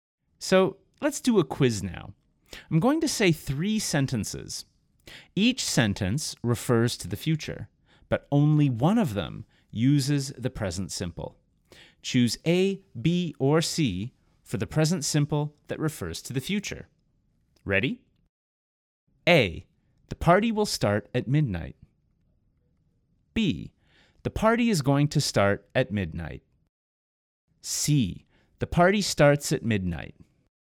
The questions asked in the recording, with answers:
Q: Choose A, B, or C for the present simple that refers to the future.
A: The answer is C.